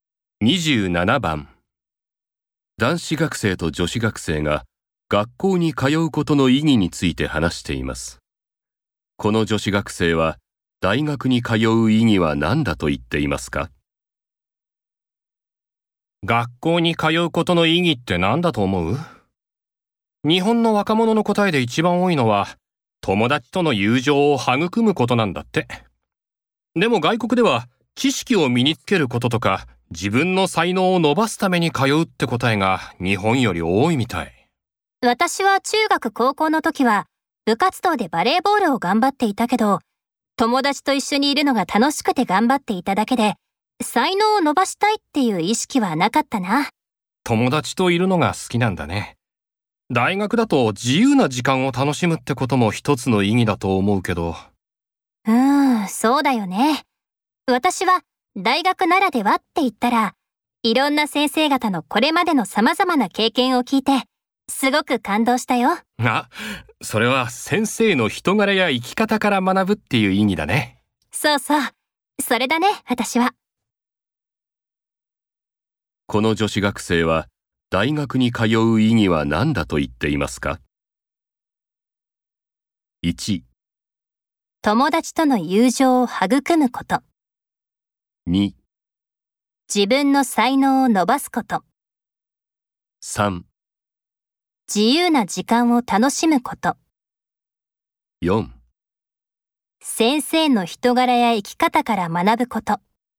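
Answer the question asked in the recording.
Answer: 4: 先生の人柄や生き方から学ぶこと。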